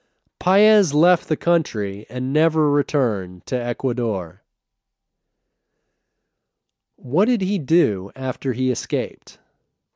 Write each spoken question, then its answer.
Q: What did he do after he escaped?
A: He left the country and never returned to Ecuador.